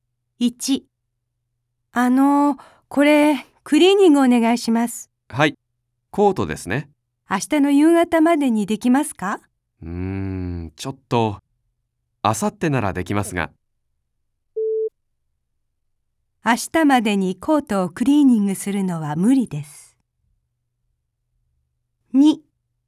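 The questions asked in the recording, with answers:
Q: 明日までにコートをクリーニングするのは無理です。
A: 正しい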